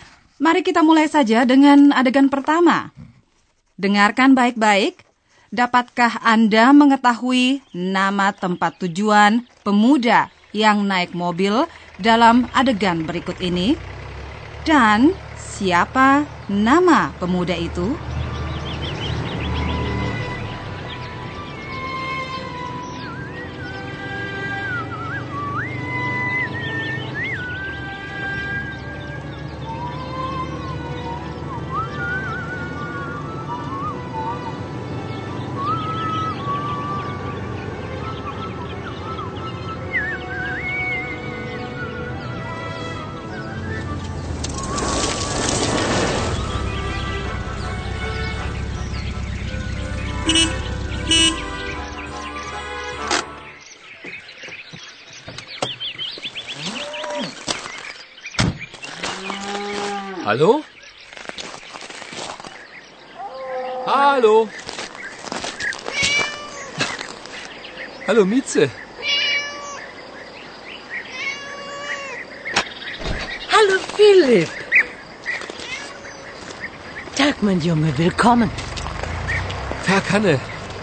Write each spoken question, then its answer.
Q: Dan siapa nama pemuda itu?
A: Barangkali Anda sudah mengetahui pula bahwa tokoh kita bernama Philip.